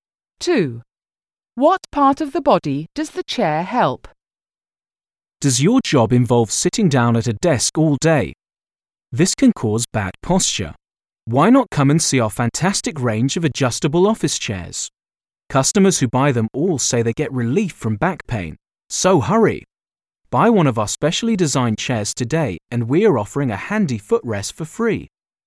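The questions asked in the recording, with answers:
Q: What part of the body does the chair help?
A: the back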